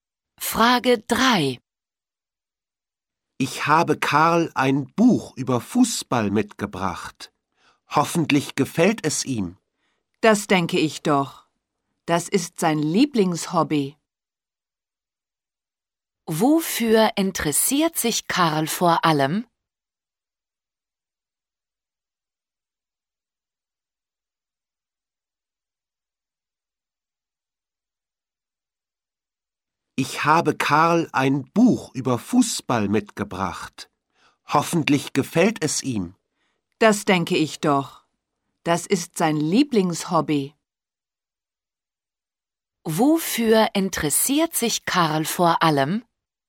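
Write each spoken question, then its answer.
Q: Wofür interessiert sich Karl vor allem?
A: Fußball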